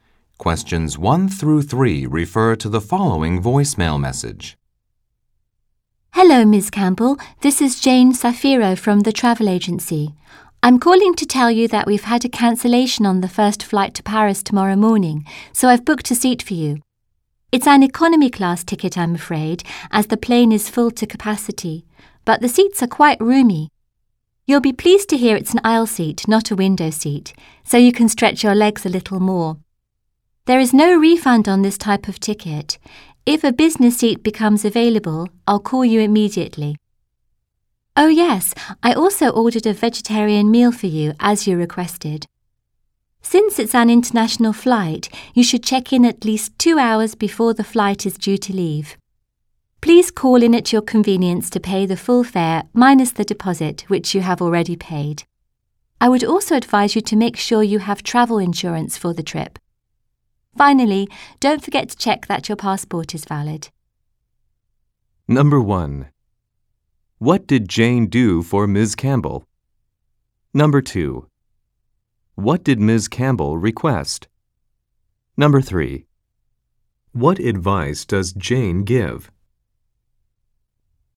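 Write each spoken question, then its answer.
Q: What did Jane do for Ms. Campbell?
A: Booked her a seat on the first flight to Paris tomorrow morning

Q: What did Ms. Campbell request?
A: A vegetarian meal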